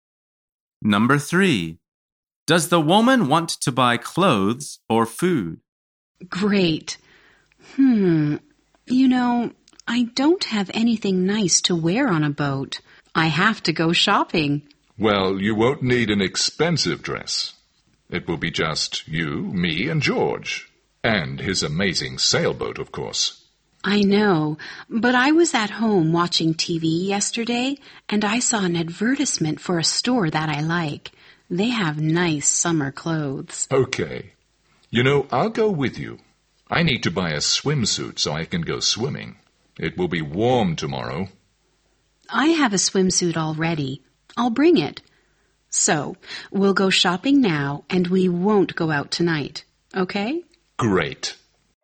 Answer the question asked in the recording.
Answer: The answer is clothes.